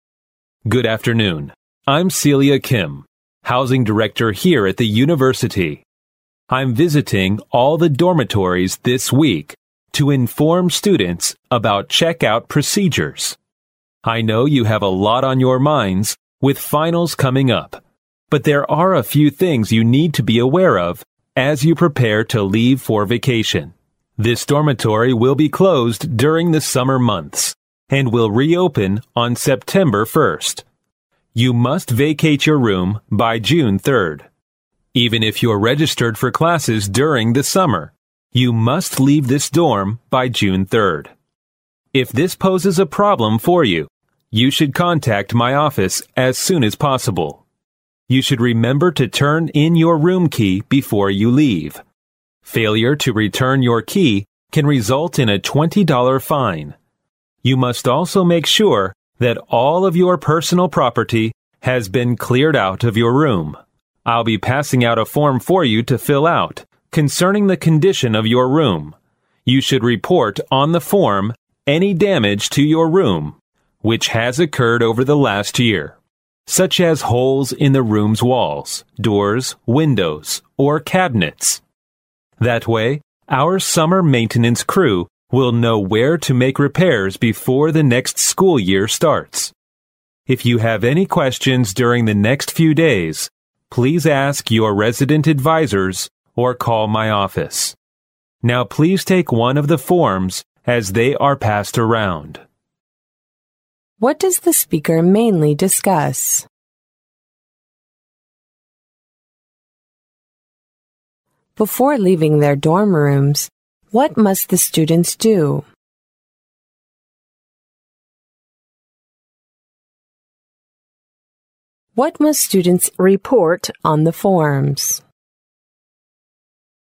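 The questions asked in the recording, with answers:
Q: What does the speaker mainly discuss?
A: Dormitory checkout procedures before summer vacation

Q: What must students report on the forms?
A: Any damage to their room over the last year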